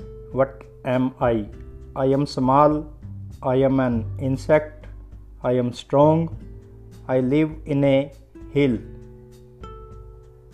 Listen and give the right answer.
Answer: I am an ant.